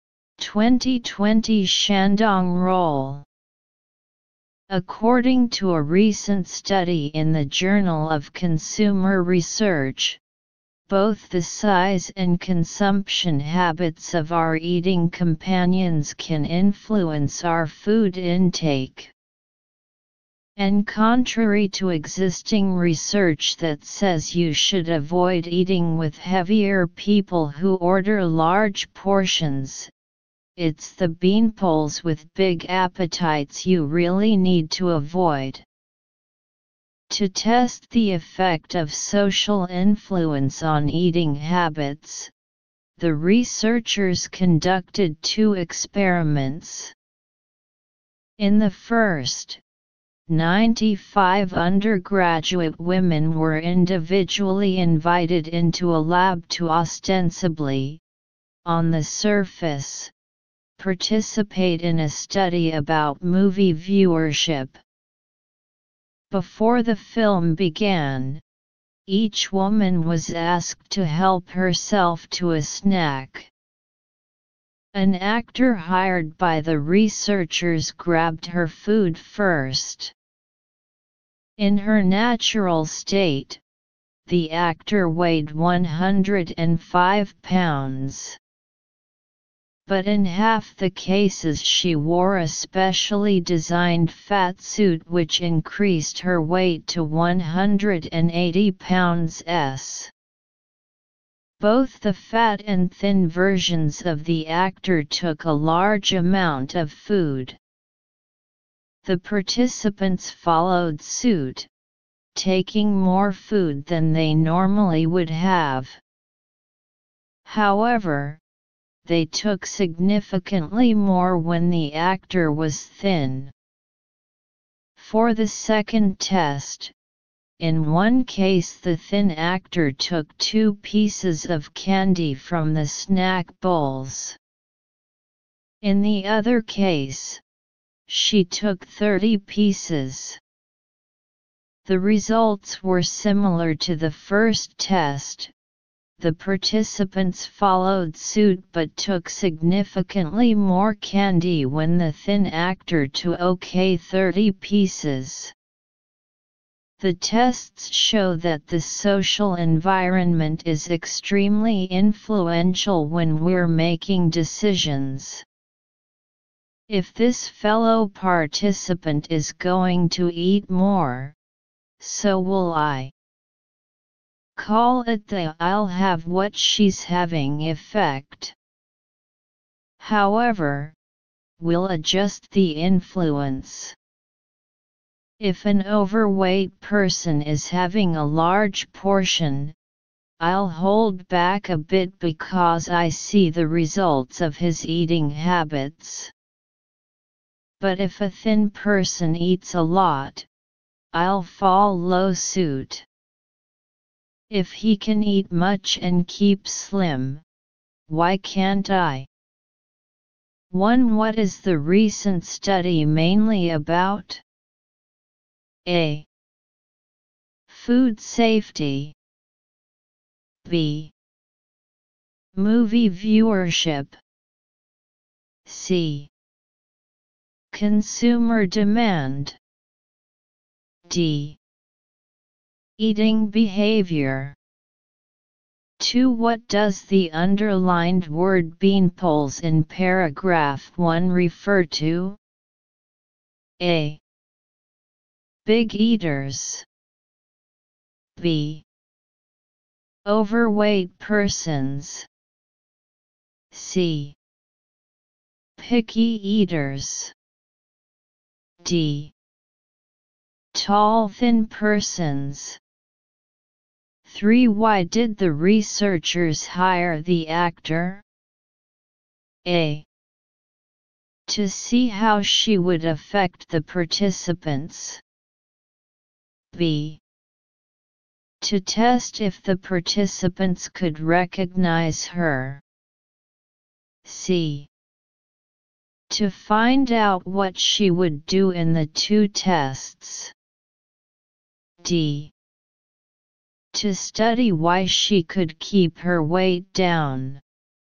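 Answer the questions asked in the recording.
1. This shows that this latest research is mainly about eating behavior.
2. D: Tall thin persons.
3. A: To see how she would affect the participants.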